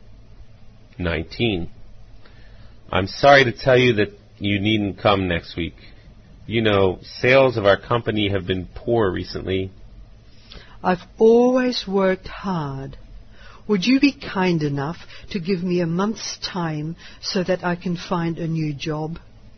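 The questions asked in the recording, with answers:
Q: What has happened to the woman?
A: She has lost her job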